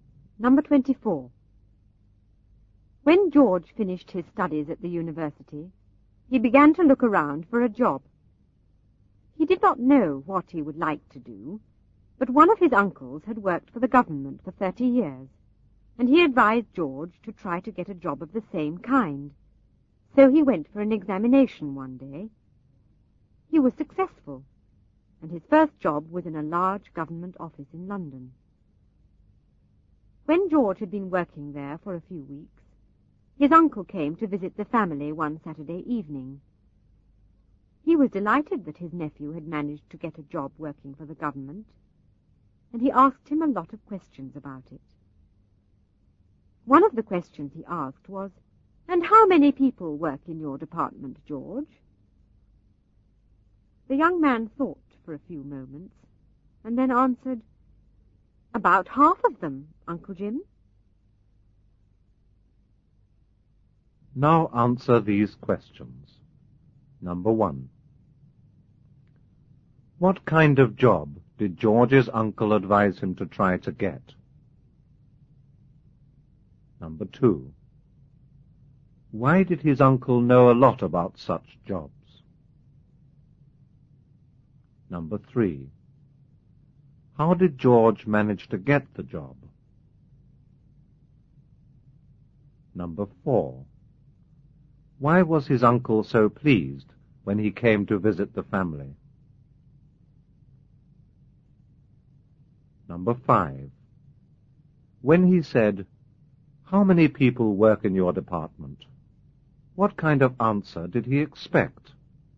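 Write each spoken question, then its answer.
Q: What kind of job did George's uncle advise him to try to get?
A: A government job, like his uncle's

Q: Why did his uncle know a lot about such jobs?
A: He had worked for the government for 30 years

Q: How did George manage to get the job?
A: He passed an examination

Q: Why was his uncle so pleased when he came to visit the family?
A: Because George had got a job working for the government

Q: When he said, "How many people work in your department?" what kind of answer did he expect?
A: The number of people employed in the department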